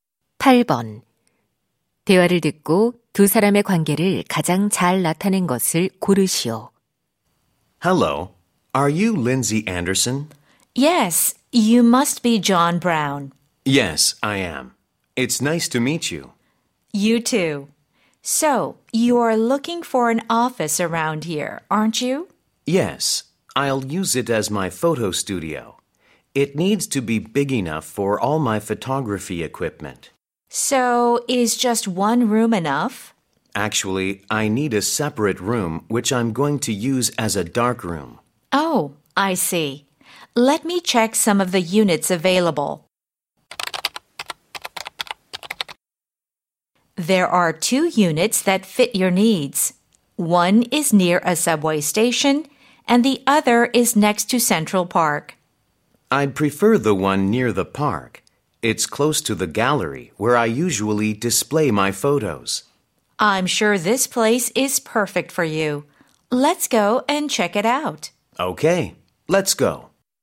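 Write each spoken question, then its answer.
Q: 대화를 듣고 두 사람의 관계를 가장 잘 나타낸 것을 고르시오.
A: 사진작가 - 부동산 중개인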